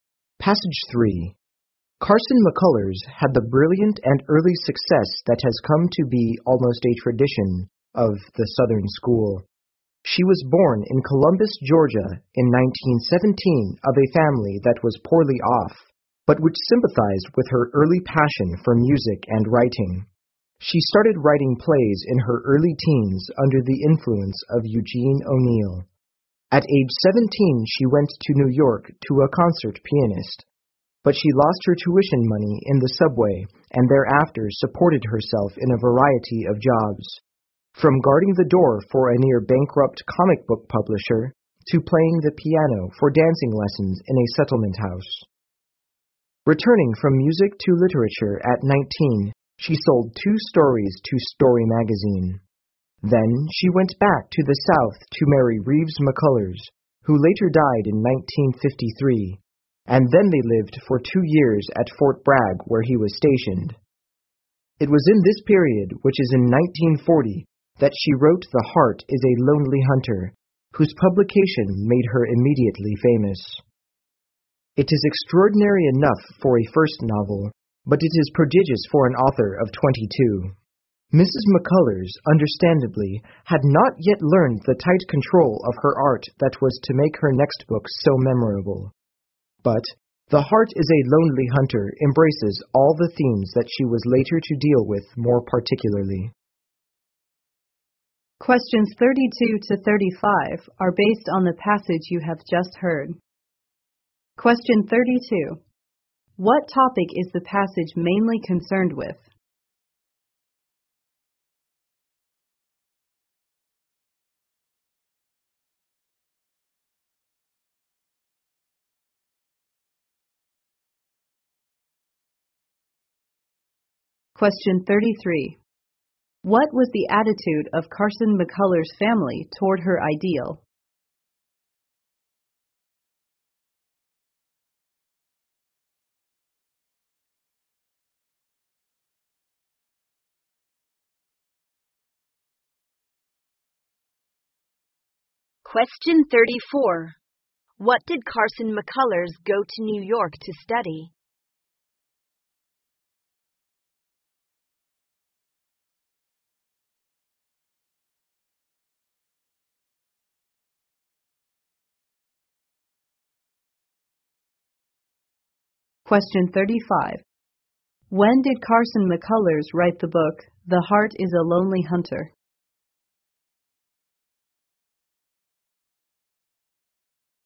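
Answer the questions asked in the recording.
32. Carson McCullers' early life and success
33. Sympathetic
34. Music (piano)
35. In 1940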